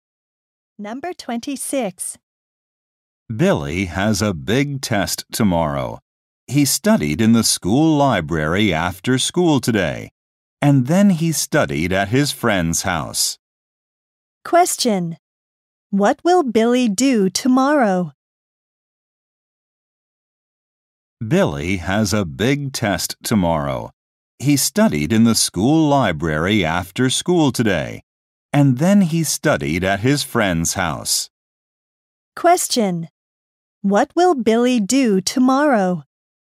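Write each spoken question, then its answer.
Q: What will Billy do tomorrow?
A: Take a big test.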